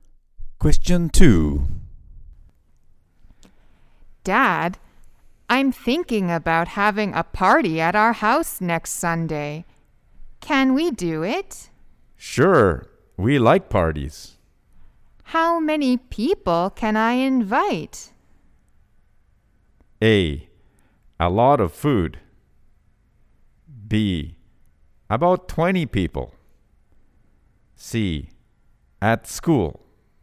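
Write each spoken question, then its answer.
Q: How many people can I invite?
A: B: About 20 people.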